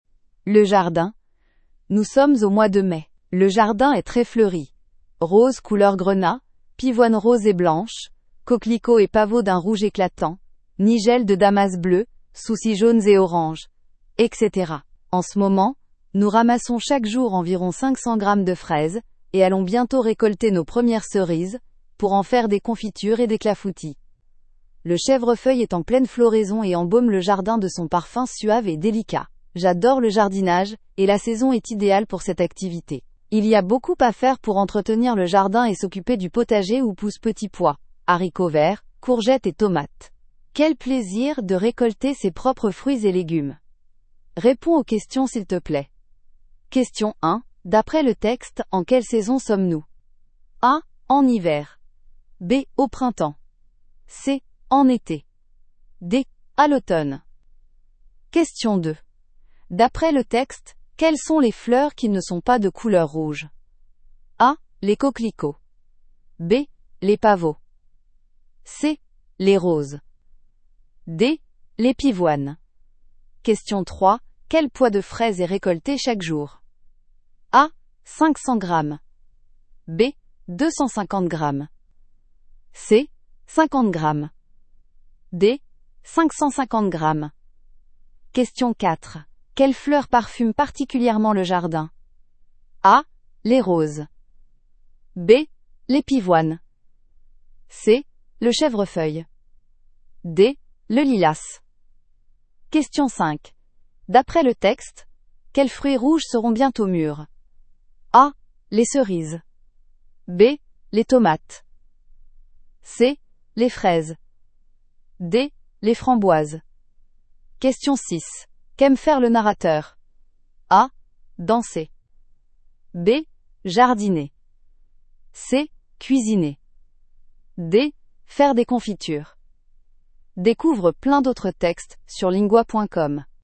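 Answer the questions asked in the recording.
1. B: Au printemps.
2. D: Les pivoines.
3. A: 500 grammes.
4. C: Le chèvrefeuille.
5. A: Les cerises.
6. B: Jardiner.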